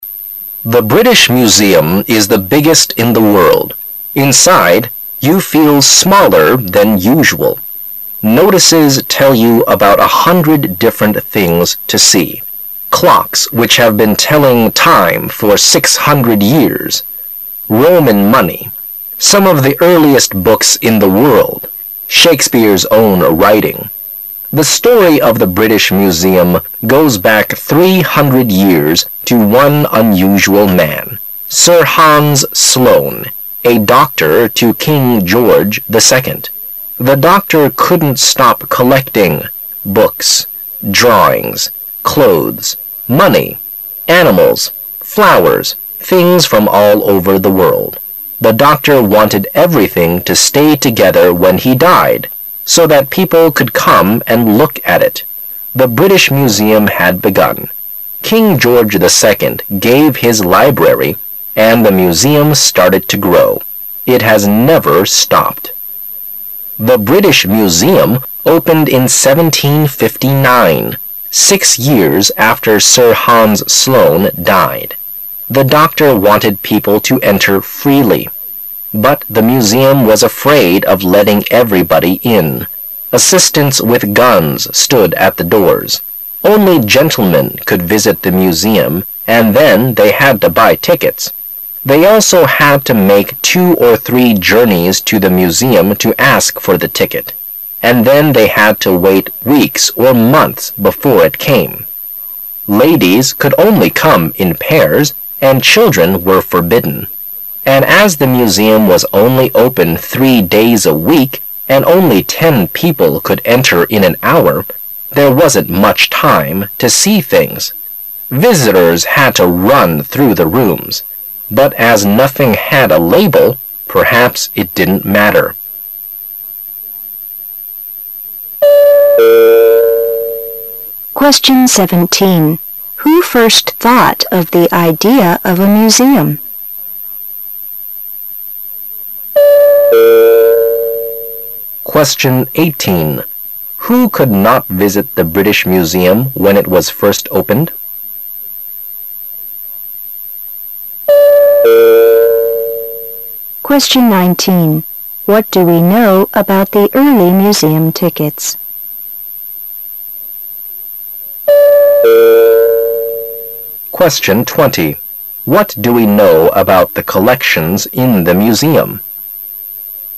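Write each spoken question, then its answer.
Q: Who first thought of the idea of a museum?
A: Sir Hans Sloane, a doctor to King George II

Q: Who could not visit the British Museum when it was first opened?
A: Children

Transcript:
[解析] 17-20 The British Museum is the biggest in the world. Inside, you feel smaller than usual. Notices tell you about a hundred different things to see: clocks which have been telling time for six hundred years, Roman money, some of the earliest books in the world, Shakespeare's own writing ... The story of the British Museum goes back three hundred years to one unusual man: Sir Hans Sloane, a doctor to King George II. The doctor couldn't stop collecting—books, drawings, clothes, money, animals, flowers: things from all over the world. The doctor wanted everything to stay together when he died, so that people could come and look at it. The British Museum had begun. 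King George II gave his library, and the Museum started to grow. It has never stopped. The British Museum opened in 1759, six years after Sir Hans Sloane died. The doctor wanted people to "enter freely". But the Museum was afraid of letting everybody in. Assistants with guns stood at the doors. Only "gentle men" could visit the Museum and then they had to buy tickets. They also had to make two or three journeys to the Museum to ask for the ticket, and then they had to wait weeks or months before it came. Ladies could only come in pairs, and children were forbidden. And as the Museum was only open three days a week and only ten people could enter in an hour, there wasn't much time to see things. Visitors had to run through the rooms. But as nothing had a label, perhaps it didn't matter.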